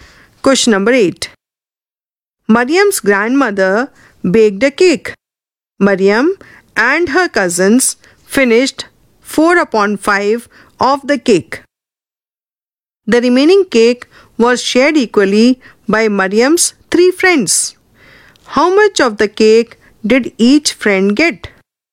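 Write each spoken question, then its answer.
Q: How much of the cake did each friend get?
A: 1/15 of the cake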